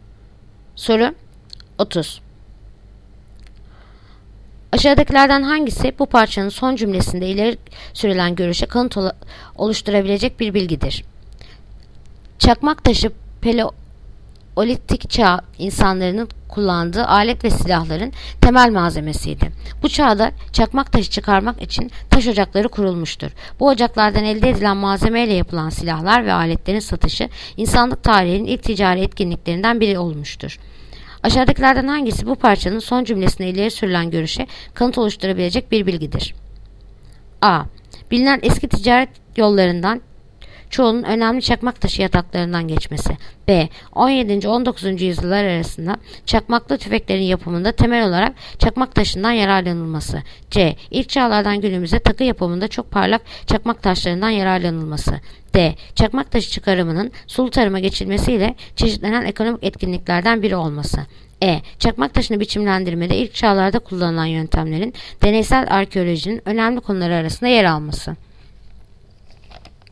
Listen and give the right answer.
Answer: Yanıt Adana. Bilinen eski ticaret yollarından çoğunun önemli çakmak taşı yataklarından geçmesi.